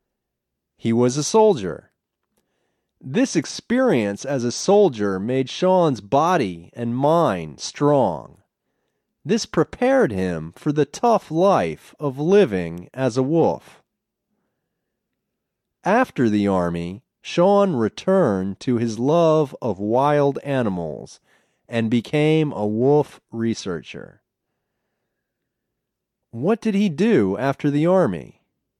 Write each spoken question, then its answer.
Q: What did he do after the army?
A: He became a wolf researcher.